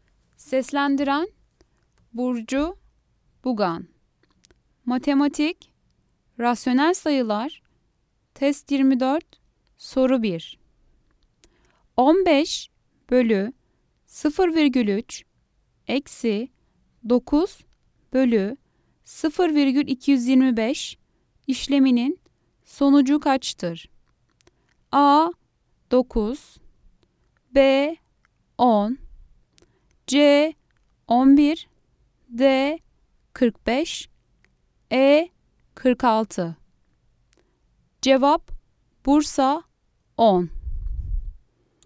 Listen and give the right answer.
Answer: Cevap Bursa 10.